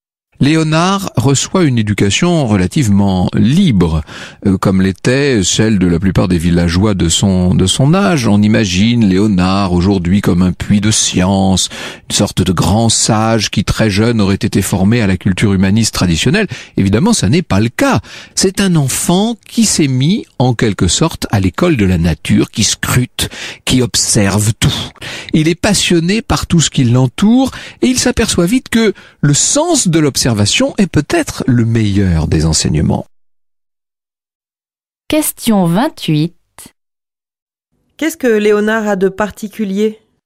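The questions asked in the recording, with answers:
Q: Qu'est-ce que Léonard a de particulier ?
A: Il apprend à l'école de la nature, en observant tout.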